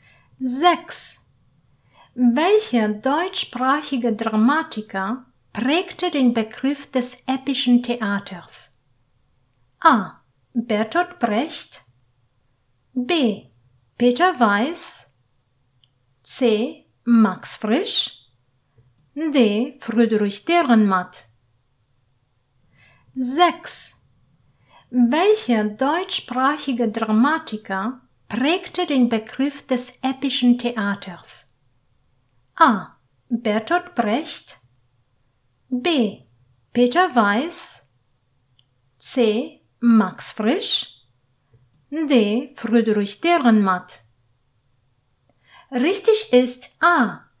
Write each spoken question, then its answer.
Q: Welcher deutschsprachige Dramatiker prägte den Begriff des epischen Theaters?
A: Richtig ist A.